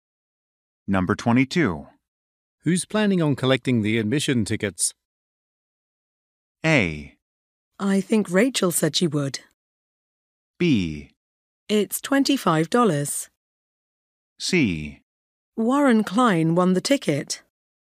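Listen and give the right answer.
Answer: A: I think Rachel said she would.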